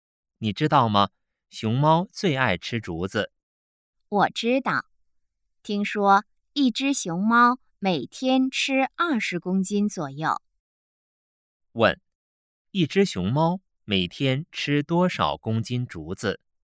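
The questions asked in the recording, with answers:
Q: 问,一只熊猫每天吃多少公斤竹子?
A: 20公斤左右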